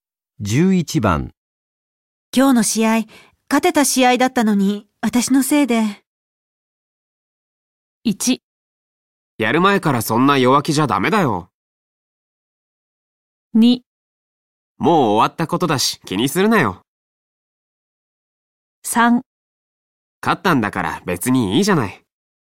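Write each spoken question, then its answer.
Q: 今日の試合、勝てた試合だったのに、私のせいで。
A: 2: もう終わったことだし気にするなよ。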